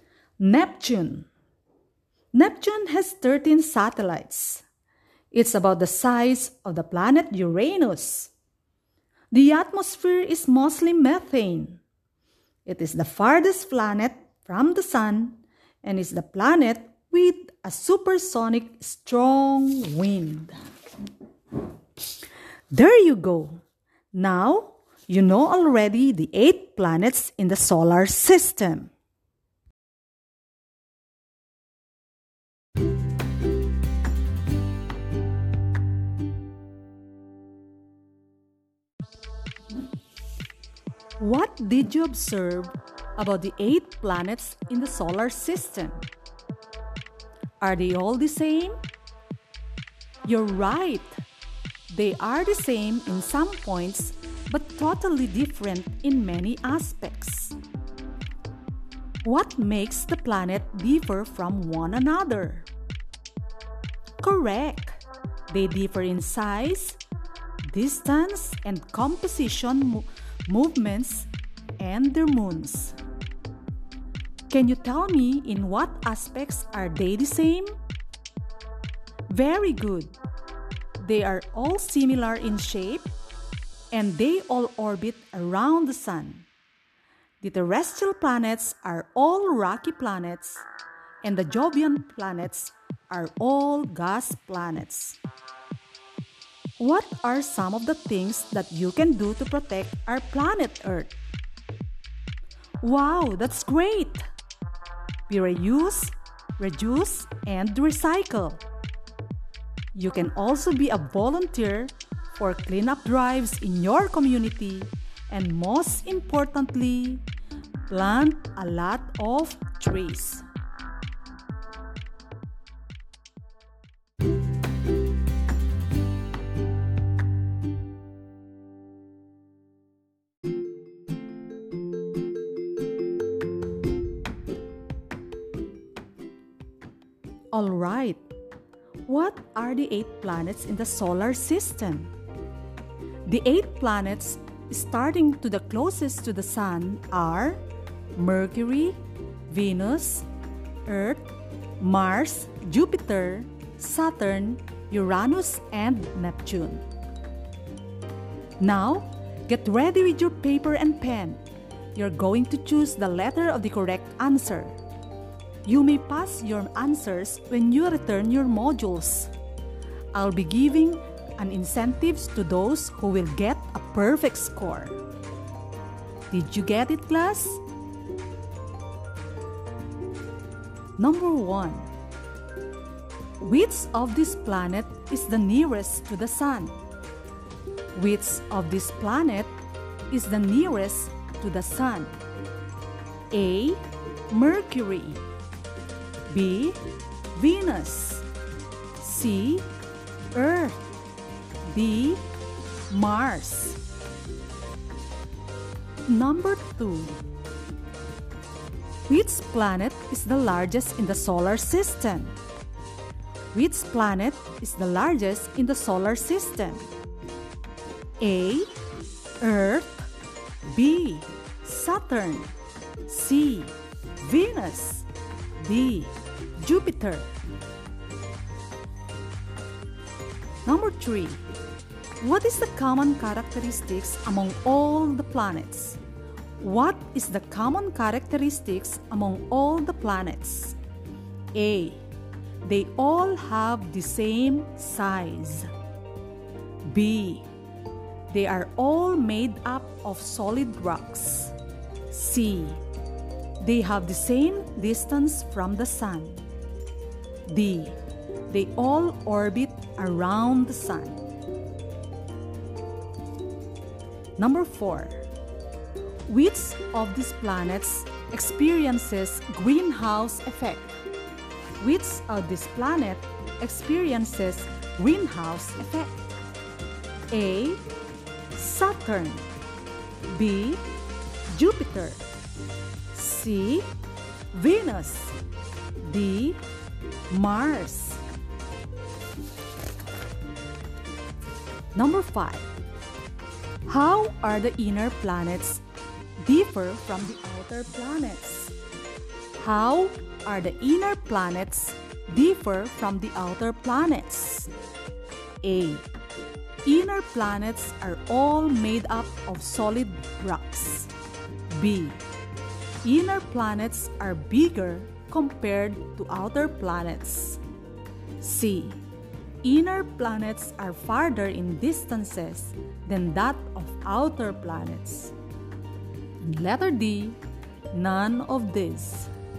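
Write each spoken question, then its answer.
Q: Which of this planet is the nearest to the sun?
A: A: Mercury

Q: What is the common characteristics among all the planets?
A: D: They all orbit around the sun.

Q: How are the inner planets differ from the outer planets?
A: A: Inner planets are all made up of solid rocks.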